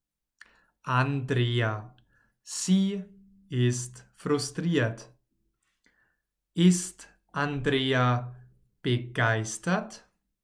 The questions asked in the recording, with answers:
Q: Ist Andrea begeistert?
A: Nein, Andrea ist nicht begeistert.